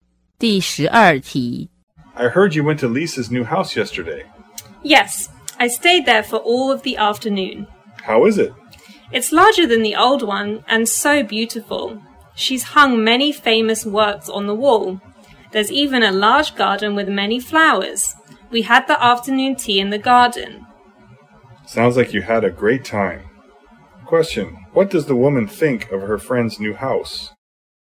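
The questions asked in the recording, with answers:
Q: what does the woman think of her friend's new house?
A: She thinks it is large and beautiful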